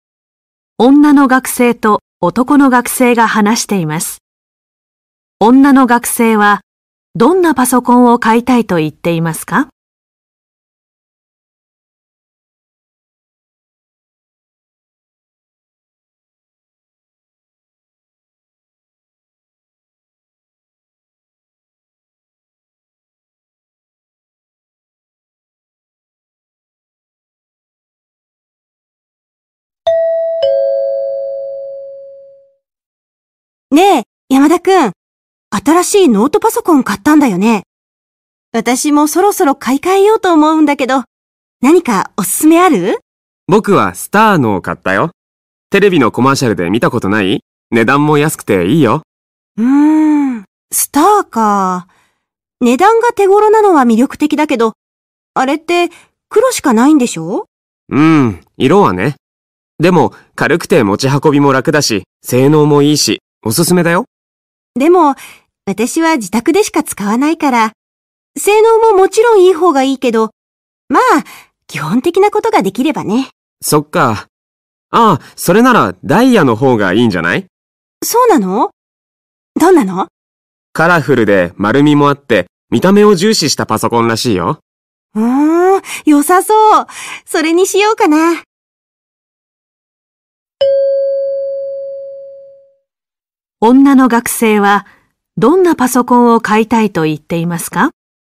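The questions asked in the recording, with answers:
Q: 女の学生はどんなパソコンを買いたいと言っていますか?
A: 見た目を重視したパソコン(カラフルで丸みのあるダイヤのパソコン)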